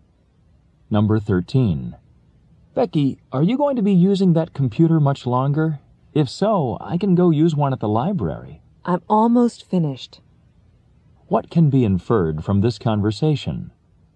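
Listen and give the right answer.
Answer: Becky will be done with the computer soon.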